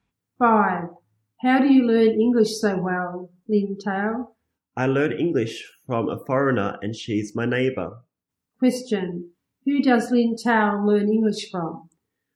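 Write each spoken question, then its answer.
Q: Question, who does Lin Tao learn English from?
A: A foreigner who is his neighbour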